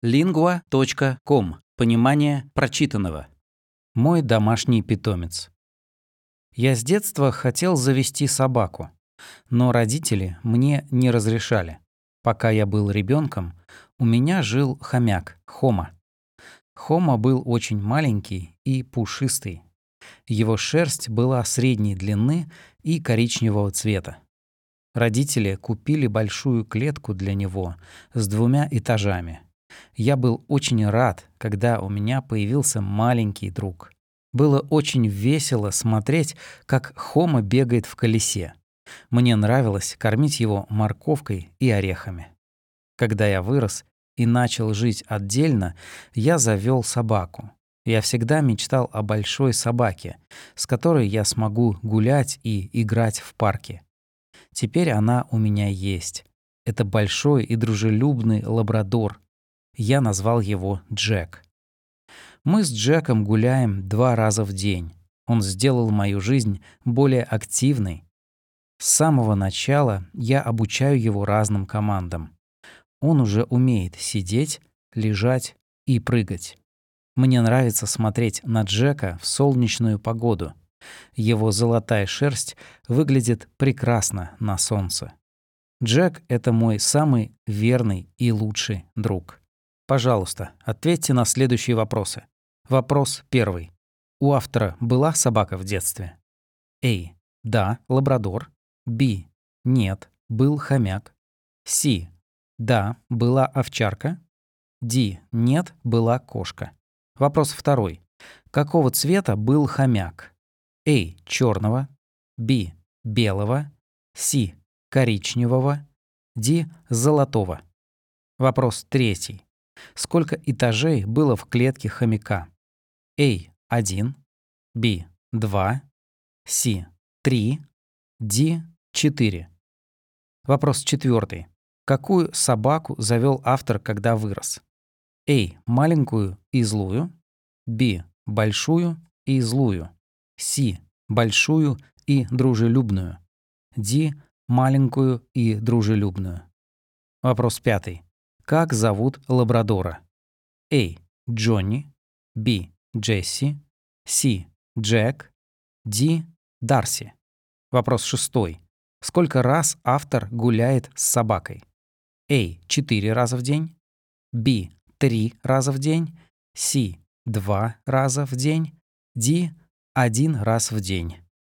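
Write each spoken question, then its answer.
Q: У автора была собака в детстве?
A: B: Нет, был хомяк.

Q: Какого цвета был хомяк?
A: C: Коричневого.

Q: Сколько этажей было в клетке хомяка?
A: B: 2

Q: Какую собаку завел автор, когда вырос?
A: C: Большую и дружелюбную.

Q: Как зовут лабрадора?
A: C: Джек.

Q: Сколько раз автор гуляет с собакой?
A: C: 2 раза в день.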